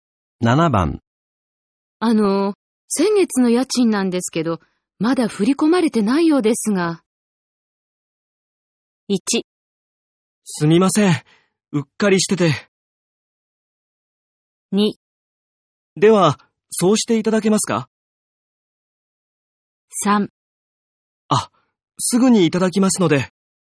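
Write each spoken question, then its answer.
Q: 先月の家賃なんですけど、まだ振り込まれてないようですが。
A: 1: すみません。うっかりしてて。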